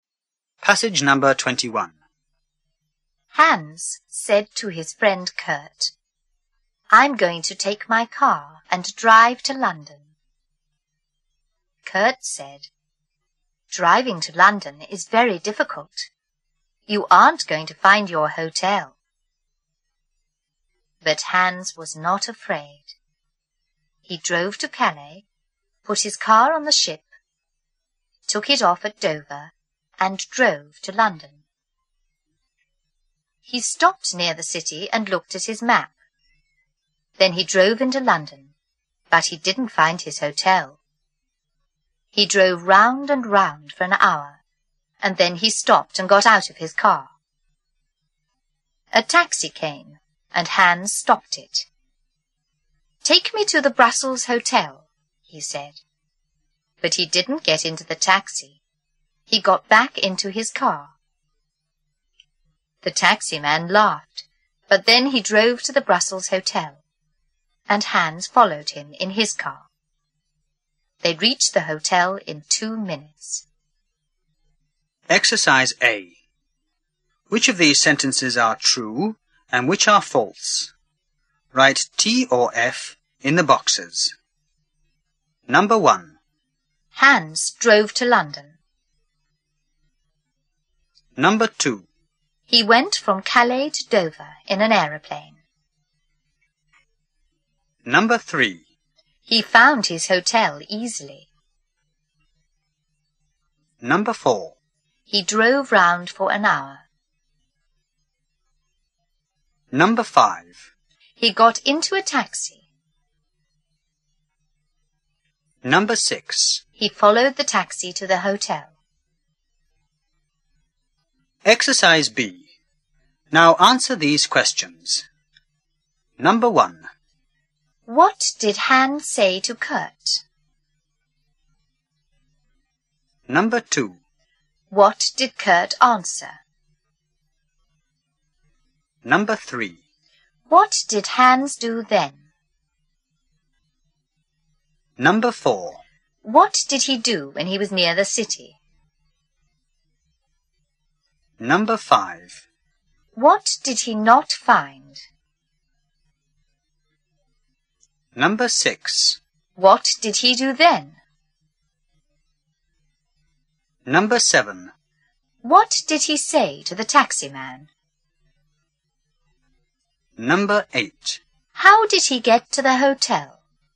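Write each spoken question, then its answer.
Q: Hans drove to London.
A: True

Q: He went from Calais to Dover in an aeroplane.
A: False

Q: He found his hotel easily.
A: False

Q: He drove round for an hour.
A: True

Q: He got into a taxi.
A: False

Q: He followed the taxi to the hotel.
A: True

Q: What did Hans say to Kurt?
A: I'm going to take my car and drive to London.

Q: What did Kurt answer?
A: Driving to London is very difficult. You aren't going to find your hotel.

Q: What did Hans do then?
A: He drove to Calais, put his car on the ship, took it off at Dover, and drove to London.

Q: What did he do when he was near the city?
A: He stopped and looked at his map.

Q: What did he not find?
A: His hotel.

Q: What did he do then?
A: He drove round and round for an hour, then stopped and got out of his car.

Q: What did he say to the taxi man?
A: Take me to the Brussels Hotel.

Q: How did he get to the hotel?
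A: He followed the taxi in his car.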